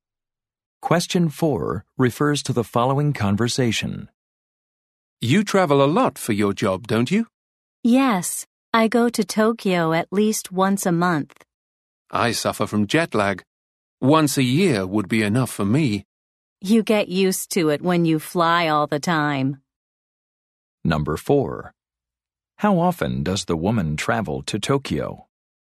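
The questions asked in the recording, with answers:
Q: How often does the woman travel to Tokyo?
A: At least once a month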